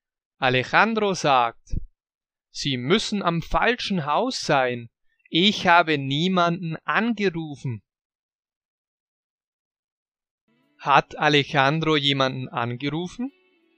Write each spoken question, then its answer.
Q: Hat Alejandro jemanden angerufen?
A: Nein, das hat er nicht. Alejandro hat niemanden angerufen.